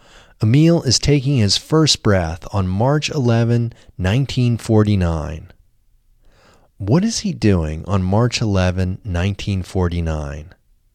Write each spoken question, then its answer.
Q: What is he doing on March 11, 1949?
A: He is taking his first breath on March 11, 1949.